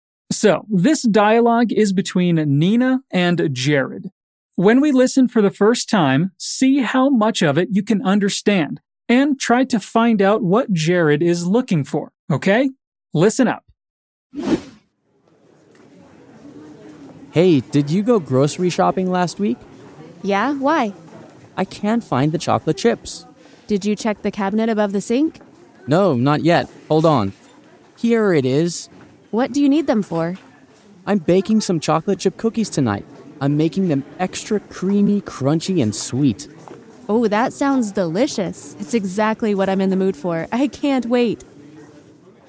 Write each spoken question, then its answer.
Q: try to find out what Jared is looking for, okay?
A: Okay, so Jared needs to find chocolate chips for something, right?